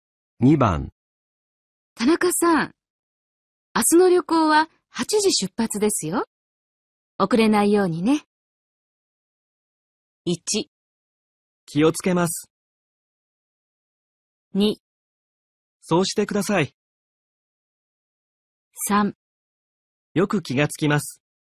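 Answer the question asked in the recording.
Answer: 1: 気をつけます。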